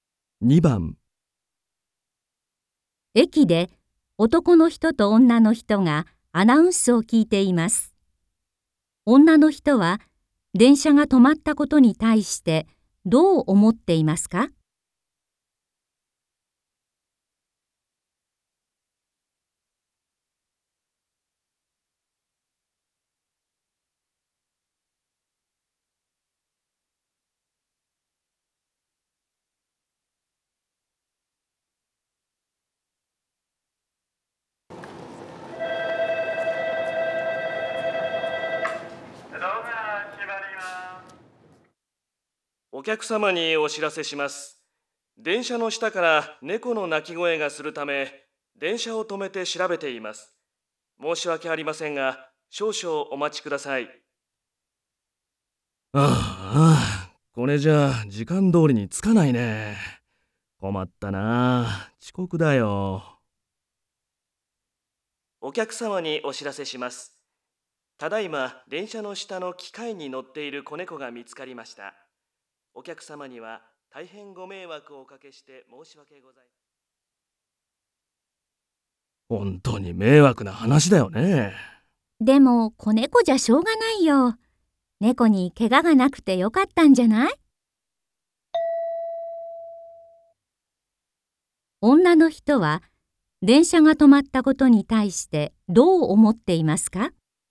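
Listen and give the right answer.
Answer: 子猫だから仕方がない(猫に怪我がなくてよかった)と思っている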